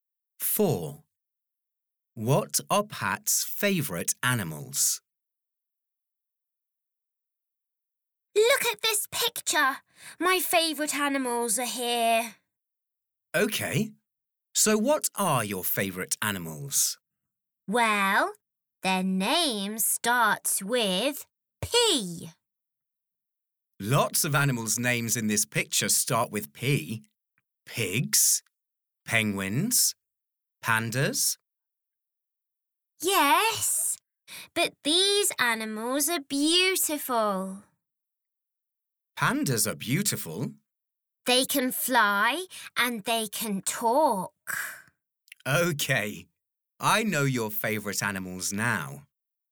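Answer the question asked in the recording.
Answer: Parrots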